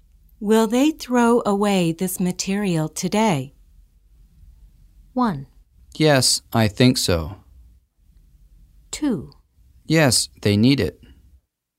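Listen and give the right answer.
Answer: 1: Yes, I think so.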